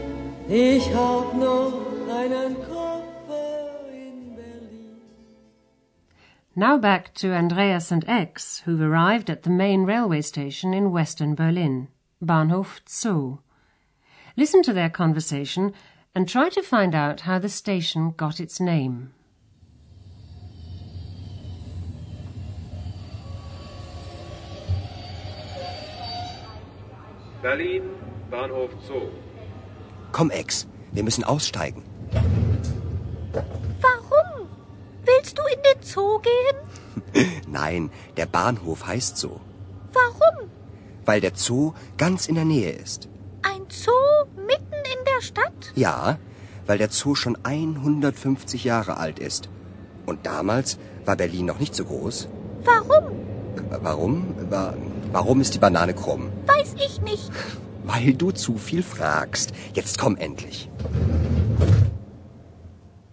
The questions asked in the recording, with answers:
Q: Listen to their conversation and try to find out how the station got its name.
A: The station is called Bahnhof Zoo because it's located near the Berlin Zoo.